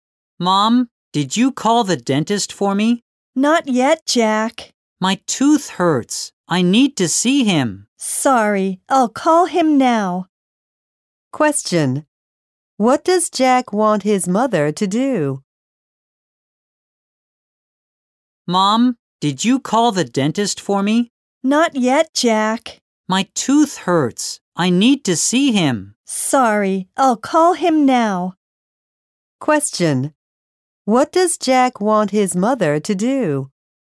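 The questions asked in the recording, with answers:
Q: What does Jack want his mother to do?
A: Call the dentist.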